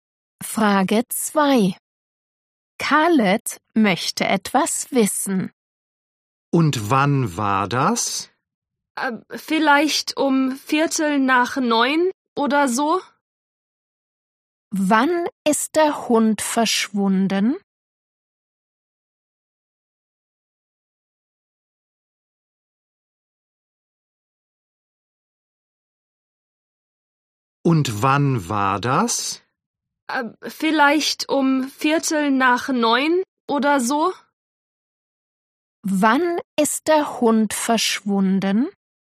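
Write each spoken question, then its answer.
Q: Wann ist der Hund verschwunden?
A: um 8:45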